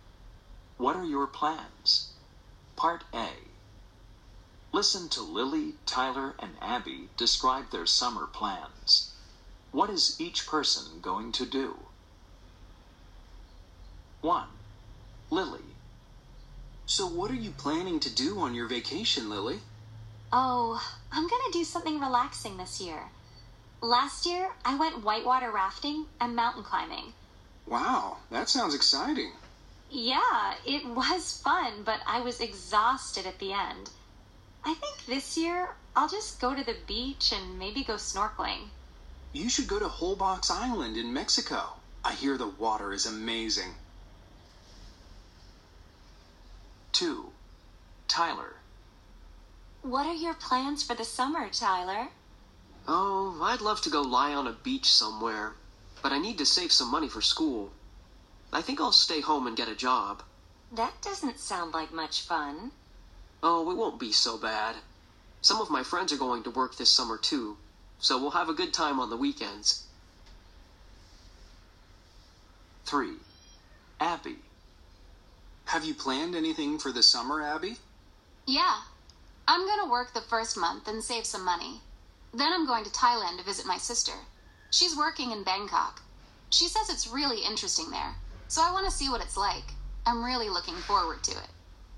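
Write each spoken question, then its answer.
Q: What is each person going to do? 1. Lily.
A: Go to the beach and maybe go snorkeling

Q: 2. Tyler.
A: Stay home and get a job

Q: 3. Abby.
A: Work the first month, then go to Thailand to visit her sister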